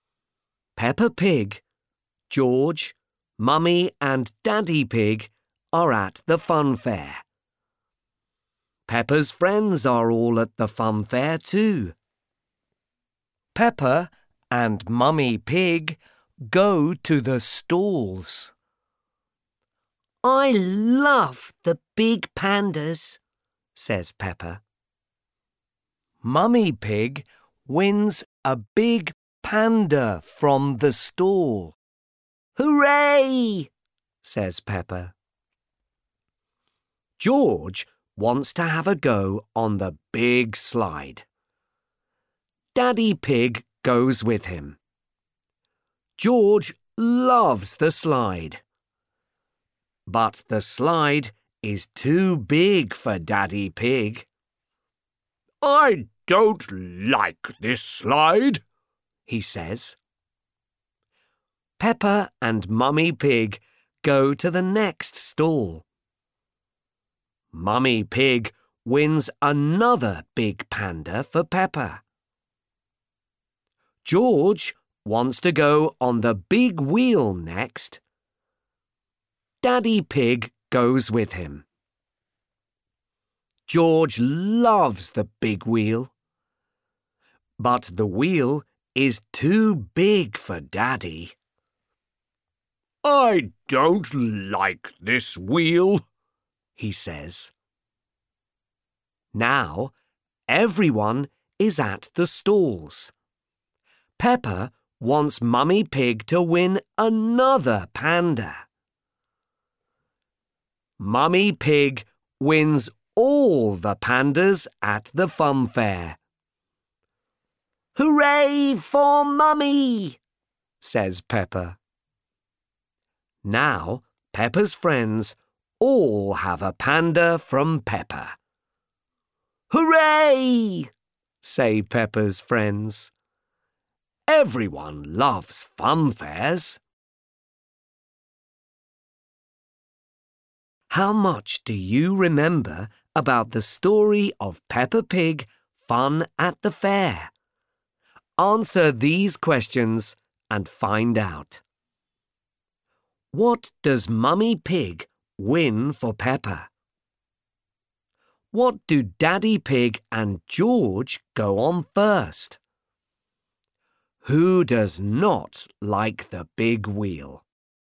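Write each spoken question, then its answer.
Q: What does Mummy Pig win for Peppa?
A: A big panda

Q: What do Daddy Pig and George go on first?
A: The big slide

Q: Who does not like the big wheel?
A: Daddy Pig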